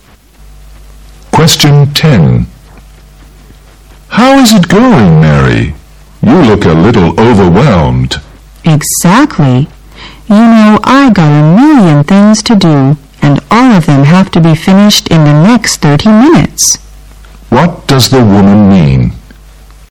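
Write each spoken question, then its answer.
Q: What does the woman mean?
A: She is very busy, with many things to finish in 30 minutes.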